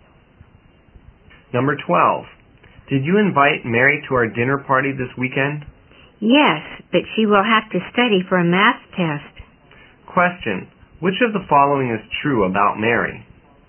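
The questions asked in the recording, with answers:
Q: which of the following is true about Mary?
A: She has to study for a math test, so she may not come to the party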